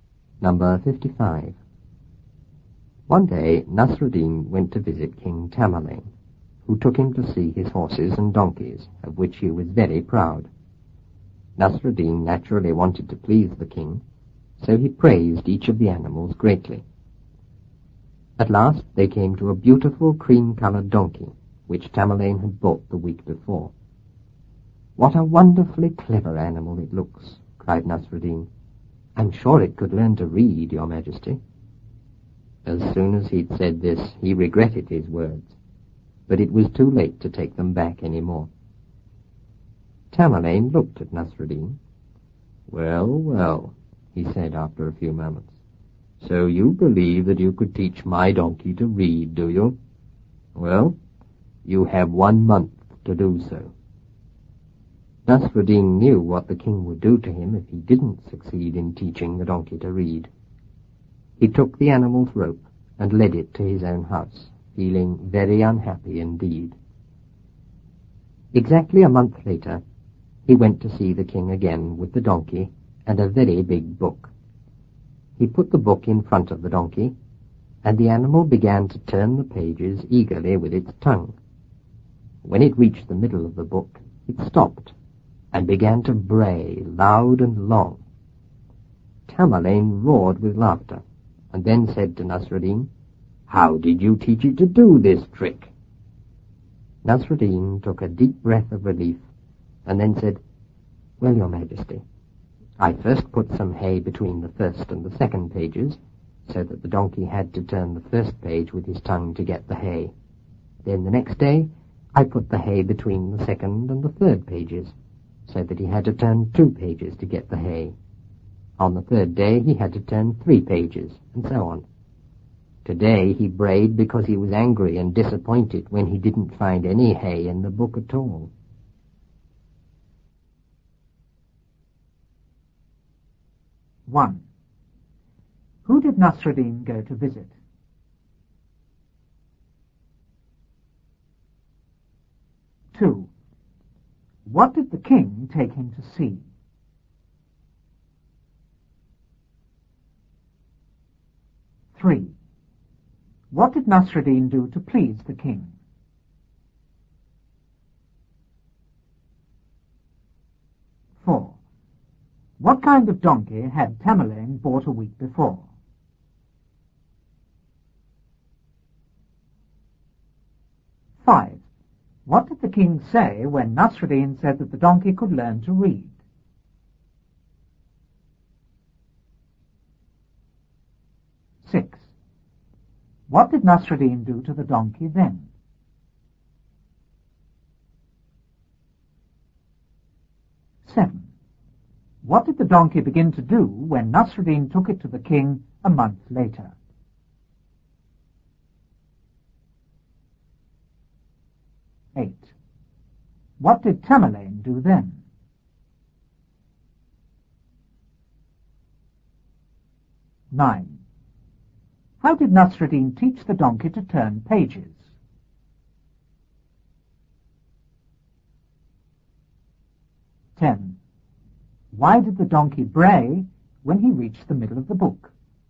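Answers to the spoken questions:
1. King Tamerlane
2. His horses and donkeys
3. He praised each of the animals greatly
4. A beautiful cream-coloured donkey
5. That Nasruddin had one month to teach it to read
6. He took its rope and led it to his own house
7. Turn the pages of a big book eagerly with its tongue
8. He roared with laughter and asked how Nasruddin taught it the trick
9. He put hay between the pages, a page further each day
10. It was angry and disappointed because it found no hay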